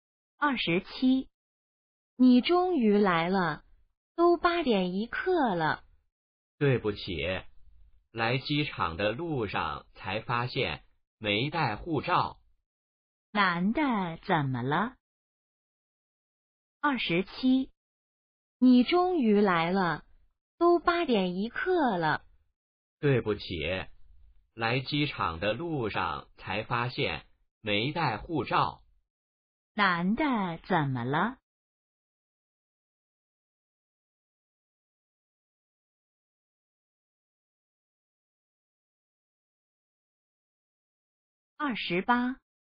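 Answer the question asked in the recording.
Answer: 没带护照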